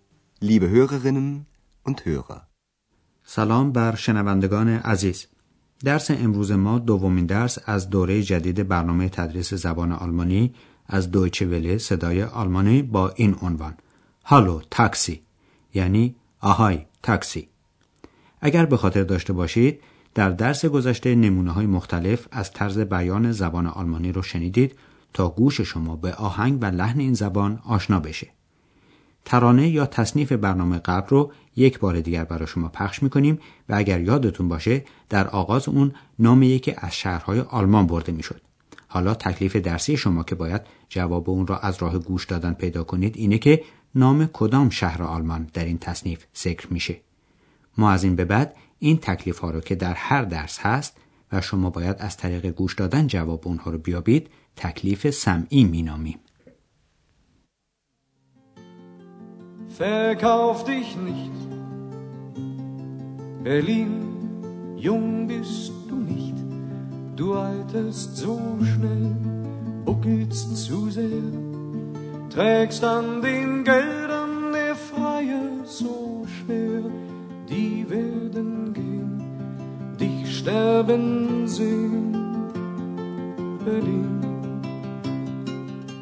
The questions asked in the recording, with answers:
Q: نام کدام شهر آلمان در این تصنیف ذکر میشه.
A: برلین برلین